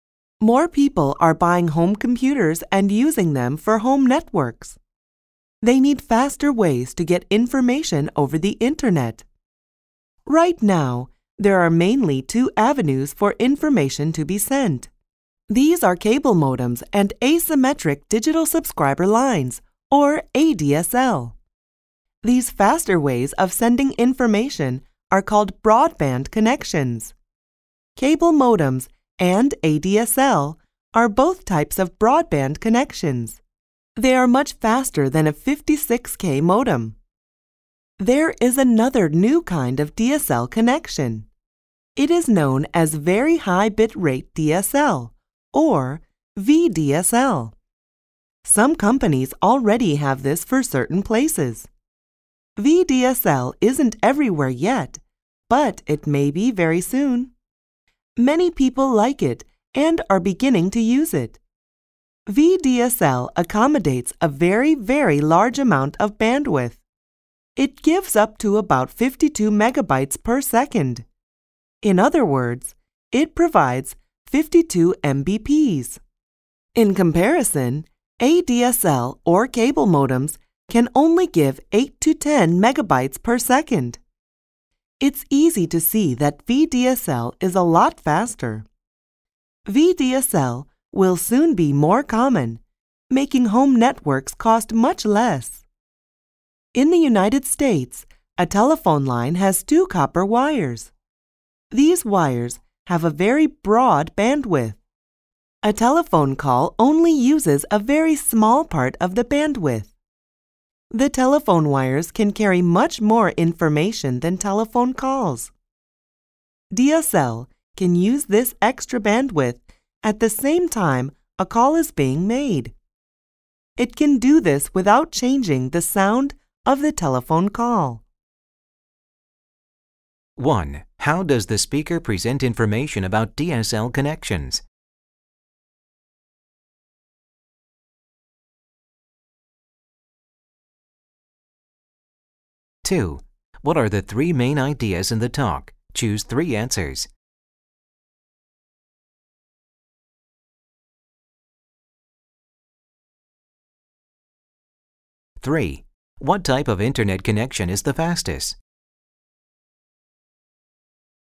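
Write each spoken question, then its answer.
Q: What type of internet connection is the fastest?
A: VDSL (very high bit rate DSL)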